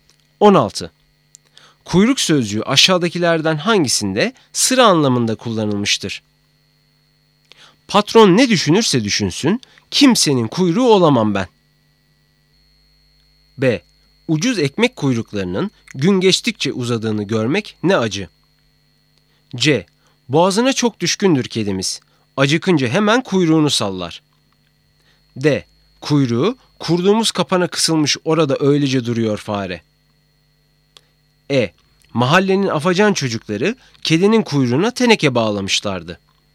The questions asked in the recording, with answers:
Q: Kuyruk sözcüğü aşağıdakilerden hangisinde sıra anlamında kullanılmıştır?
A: Doğru cevap B.